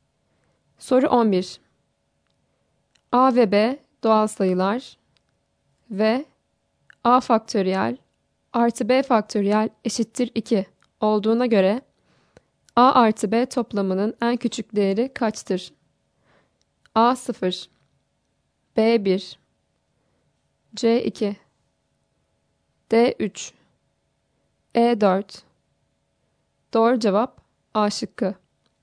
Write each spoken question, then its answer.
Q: A ve B doğal sayılar ve A faktöriyel artı B faktöriyel eşittir 2 olduğuna göre A artı B toplamının en küçük değeri kaçtır?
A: Doğru cevap A şıkkı.